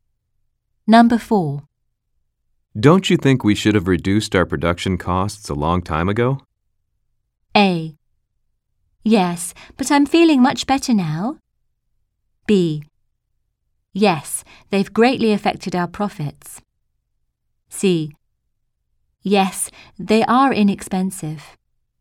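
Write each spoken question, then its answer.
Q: Don't you think we should have reduced our production costs a long time ago?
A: B: Yes, they've greatly affected our profits.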